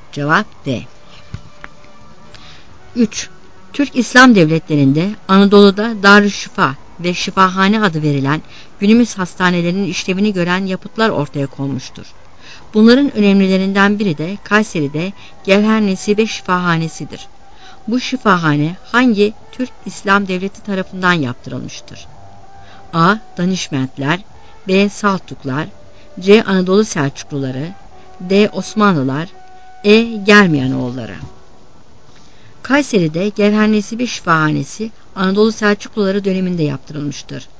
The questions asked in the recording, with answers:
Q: Bu şifahane hangi Türk İslam devleti tarafından yaptırılmıştır?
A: Cevap C.